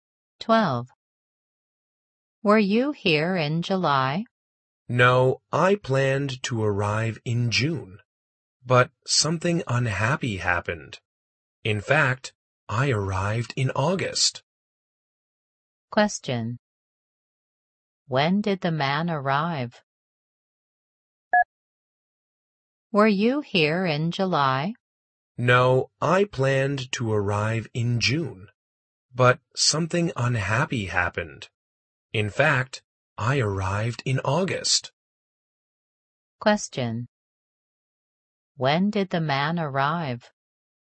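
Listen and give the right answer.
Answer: In August.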